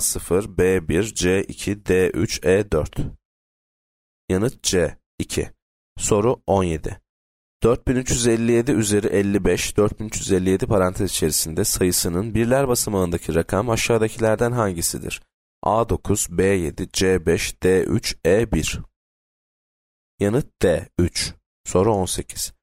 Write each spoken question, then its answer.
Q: 4357 üzeri 55, 4357 parantez içerisinde sayısının birler basamağındaki rakam aşağıdakilerden hangisidir?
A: Yanıt D 3.